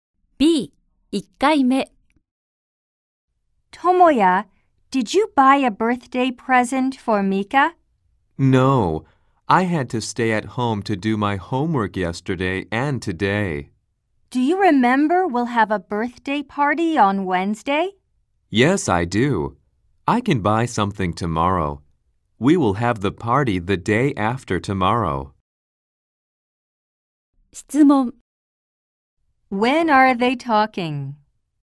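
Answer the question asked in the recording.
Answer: On Monday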